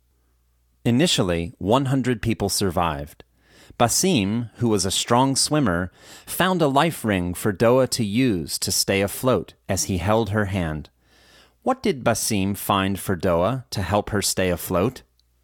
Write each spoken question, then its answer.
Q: What did Basim find for Doa to help her stay afloat?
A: Basim found a life ring for Doa to help her stay afloat.